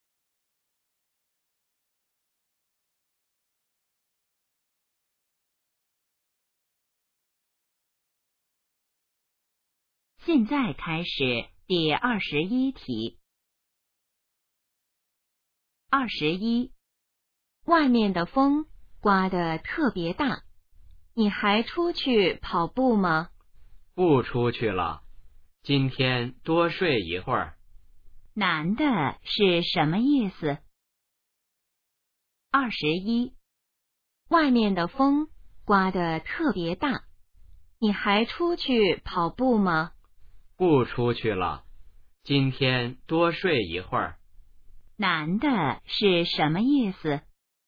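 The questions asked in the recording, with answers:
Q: 男的是什么意思?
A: 今天不出去跑步了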